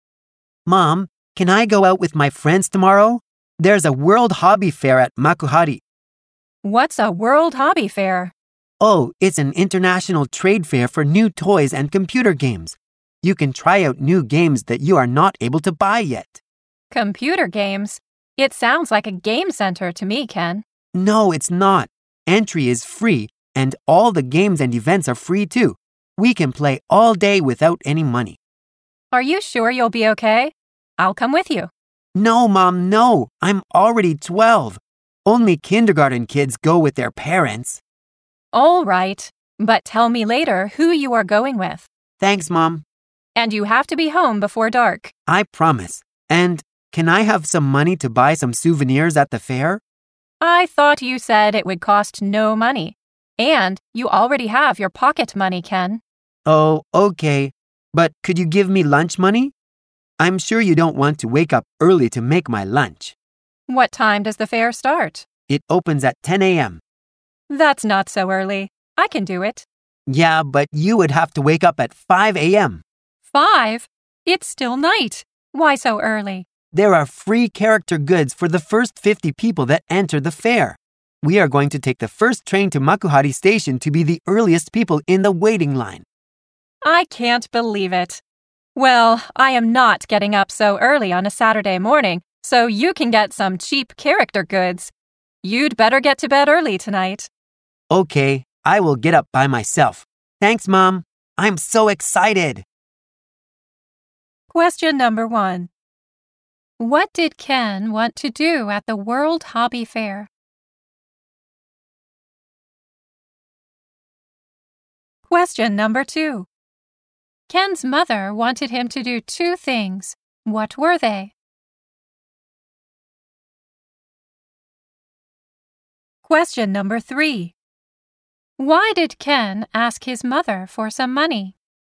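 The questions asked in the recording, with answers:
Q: What did Ken want to do at the World Hobby Fair?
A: Try out new games that he can't buy yet.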